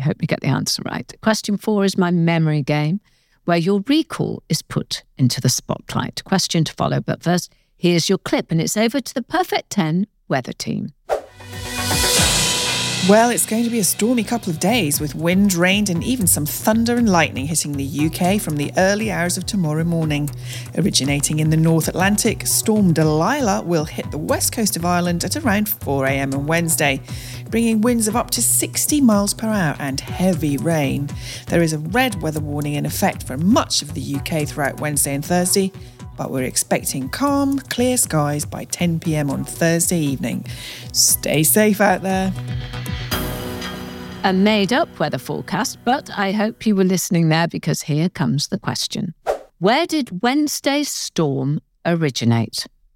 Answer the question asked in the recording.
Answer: The answer in the clip was, it originated from the North Atlantic.